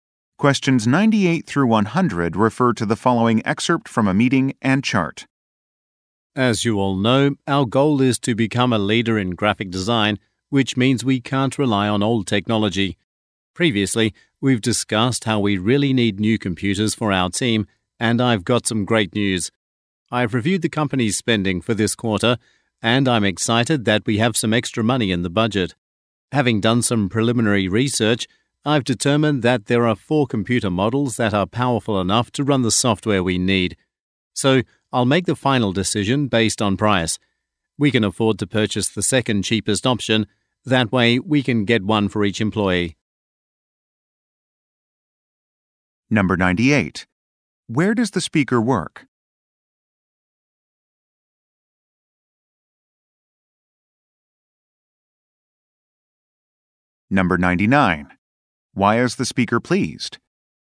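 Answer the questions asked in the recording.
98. At a graphic design company
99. There is extra money in the budget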